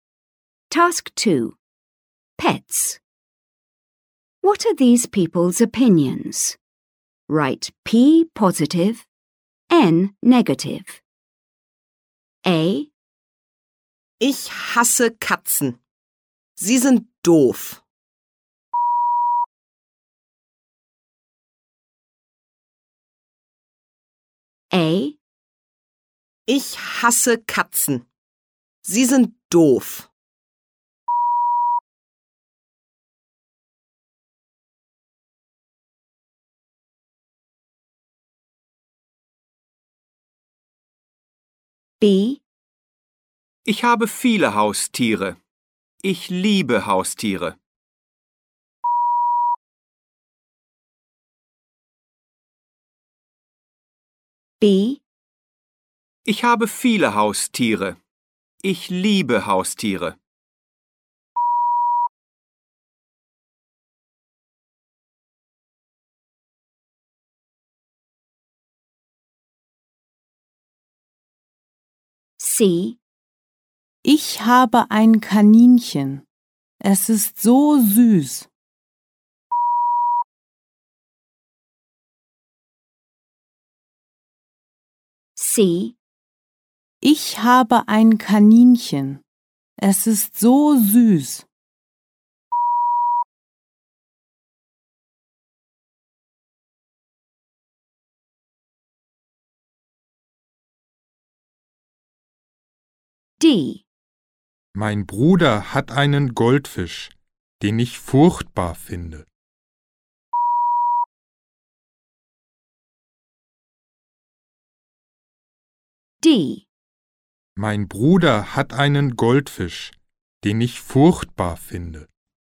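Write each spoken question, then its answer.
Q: Pets. What are these people's opinions?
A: N (negative)

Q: Pets. What are these people's opinions?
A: P (positive)

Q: Pets. What are these people's opinions?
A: P (positive)

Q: Pets. What are these people's opinions?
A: N (negative)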